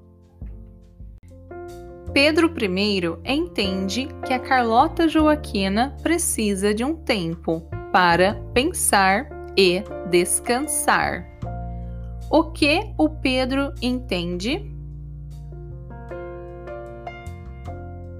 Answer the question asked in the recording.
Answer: Ele entende que a Carlota Joaquina precisa de um tempo para pensar e descansar.